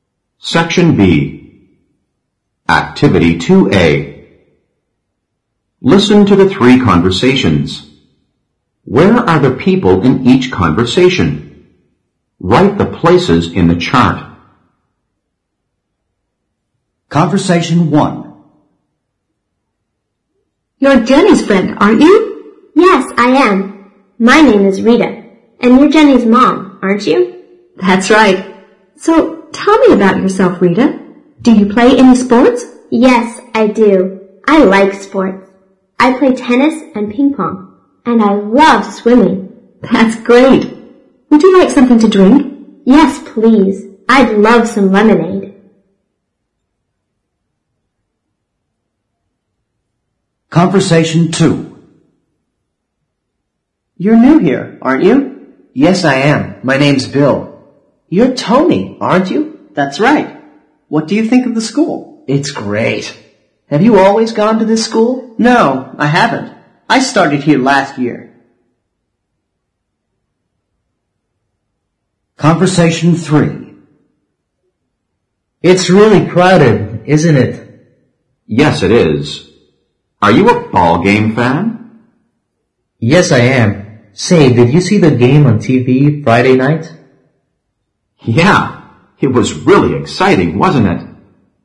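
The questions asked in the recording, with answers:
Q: Where are the people in each conversation?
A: At school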